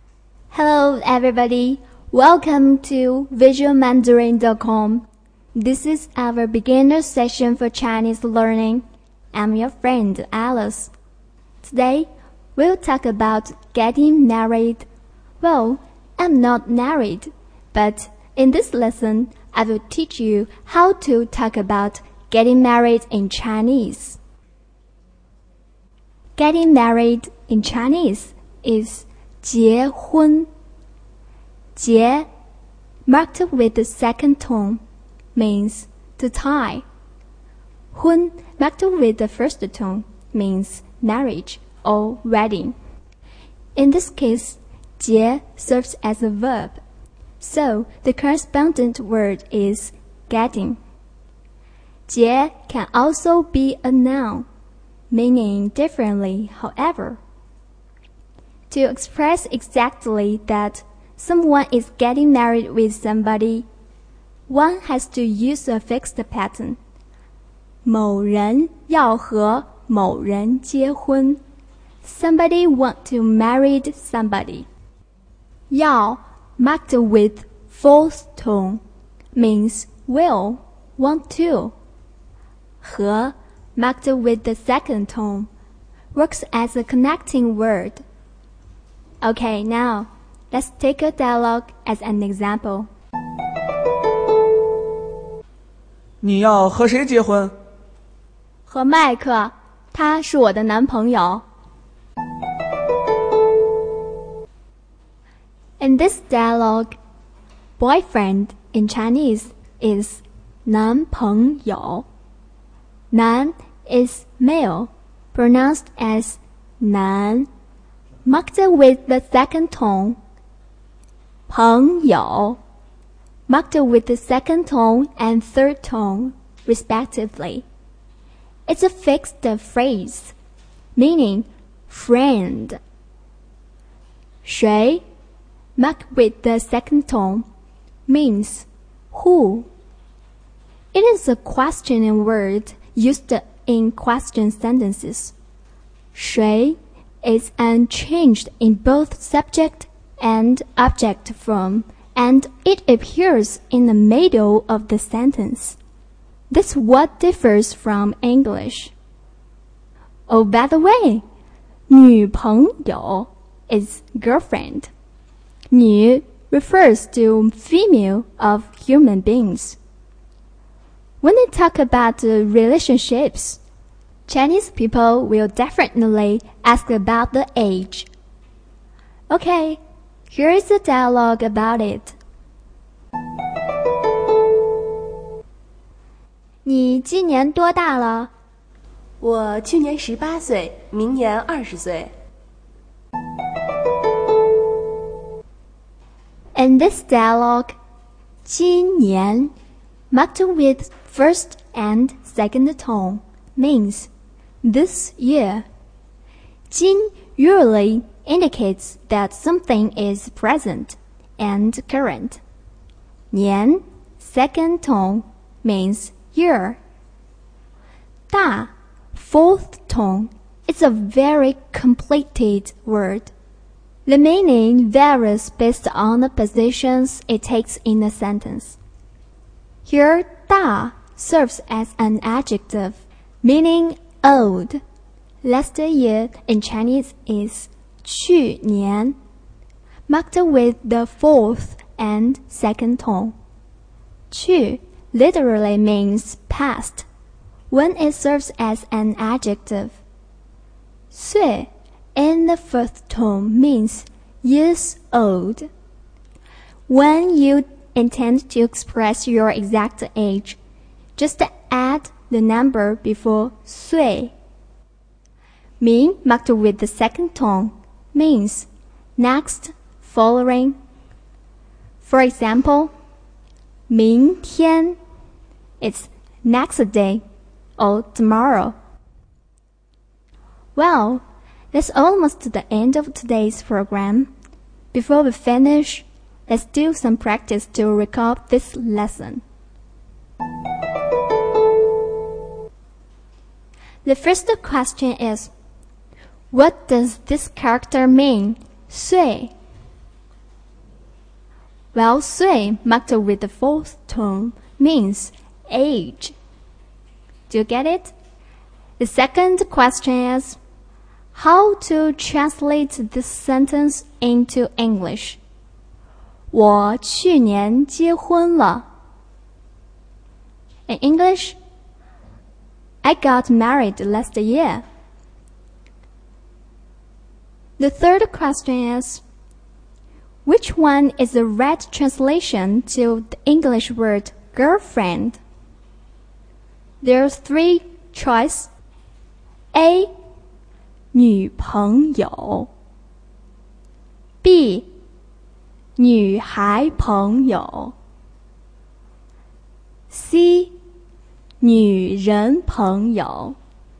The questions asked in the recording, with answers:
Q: what does this character mean, 岁?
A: 岁 marked with the fourth tone means age.

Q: how to translate this sentence into English? 我去年结婚了。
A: In English, I got married last year.

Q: which one is the right translation to the English word girlfriend?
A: A, 呀, 女朋友。